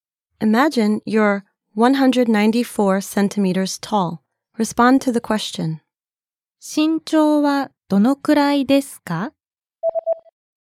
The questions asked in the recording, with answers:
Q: 身長はどのくらいですか?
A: 194センチです。